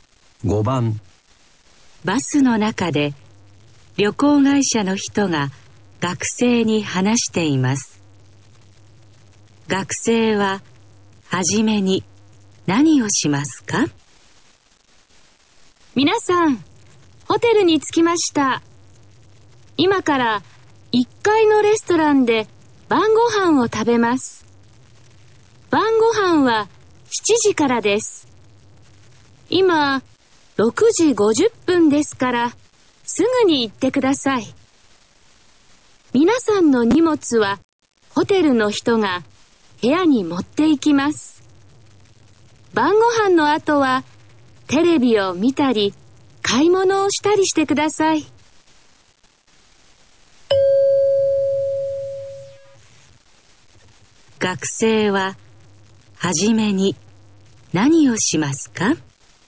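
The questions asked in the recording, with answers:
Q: 学生は初めに何をしますか?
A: 1階のレストランで晩ご飯を食べる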